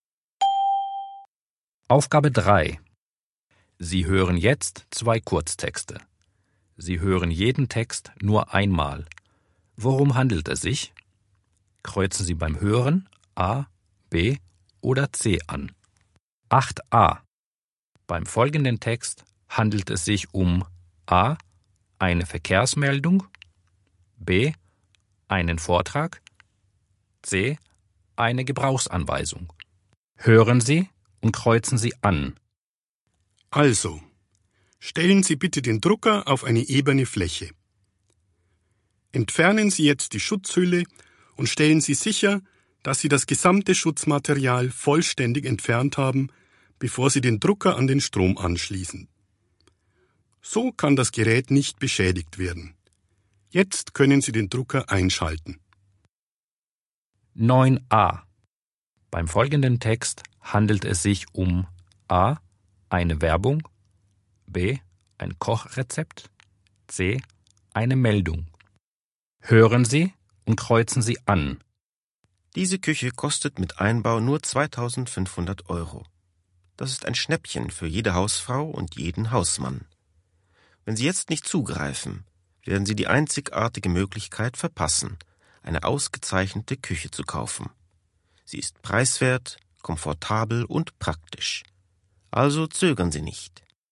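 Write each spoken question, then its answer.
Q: Beim folgenden Text handelt es sich um A. eine Verkehrsmeldung, B. einen Vortrag, C. eine Gebrauchsanweisung.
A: C: eine Gebrauchsanweisung

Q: Beim folgenden Text handelt es sich um A. eine Werbung, B. ein Kochrezept, C. eine Meldung.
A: A: eine Werbung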